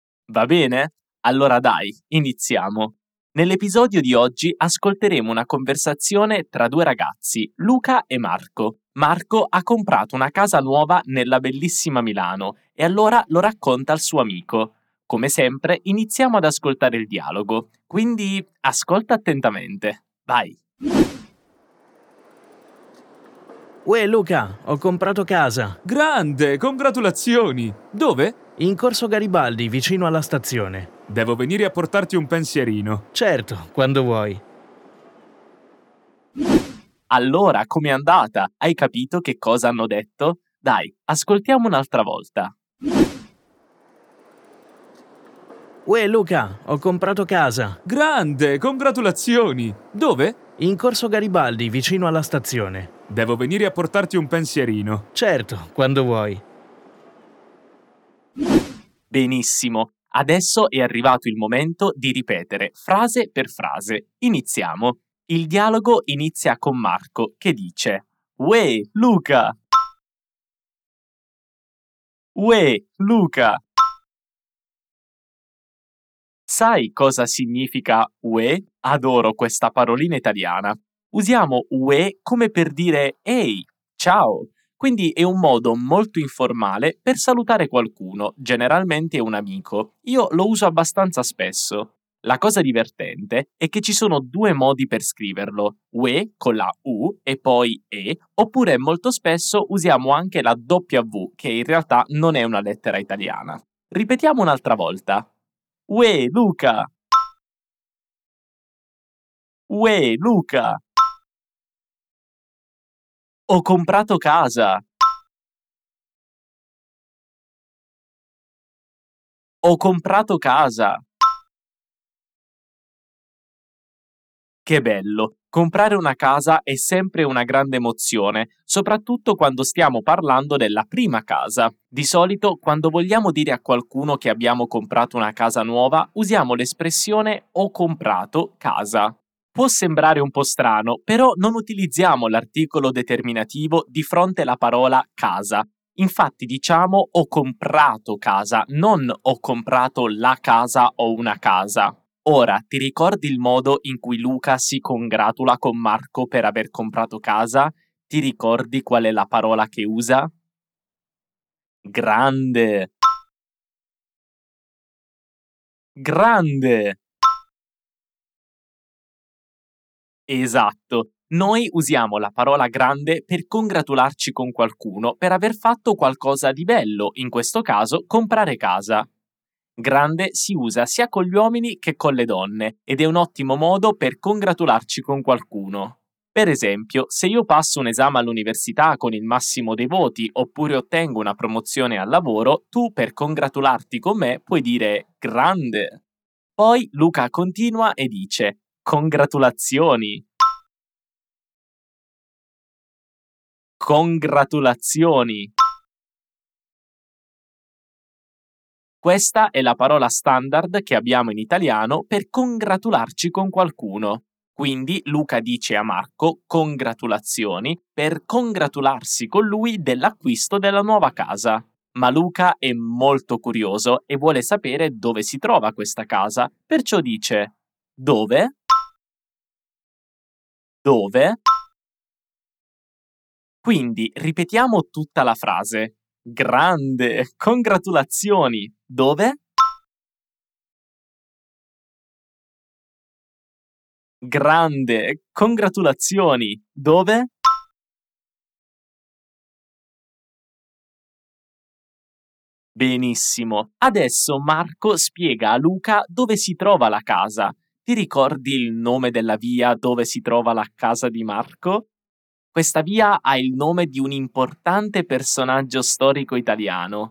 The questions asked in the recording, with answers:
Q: Ti ricordi il nome della via dove si trova la casa di Marco?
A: In Corso Garibaldi.